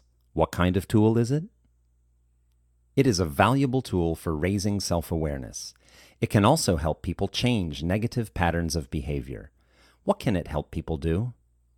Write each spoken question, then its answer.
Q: What can it help people do?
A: It can help people change negative patterns of behavior.